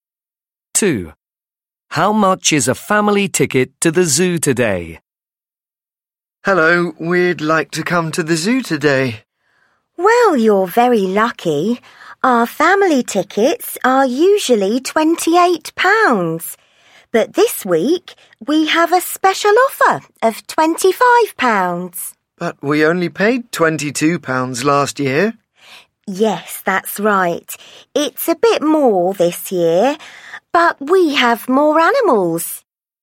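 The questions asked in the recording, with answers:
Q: How much is a family ticket to the zoo today?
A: £25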